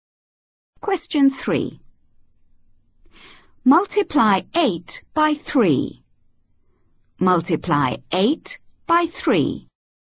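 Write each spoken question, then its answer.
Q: Multiply 8 by 3.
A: 24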